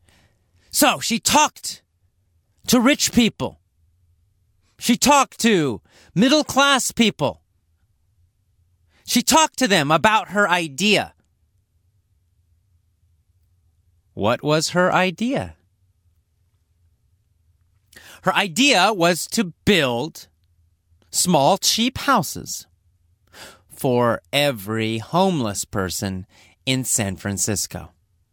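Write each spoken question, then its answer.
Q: What was her idea?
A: To build small, cheap houses for every homeless person in San Francisco.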